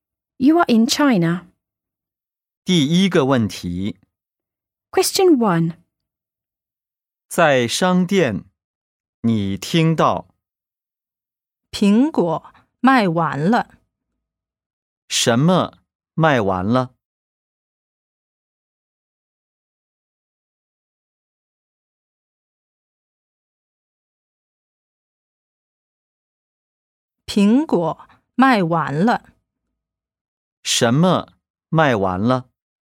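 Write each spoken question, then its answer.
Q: 什么卖完了?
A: 苹果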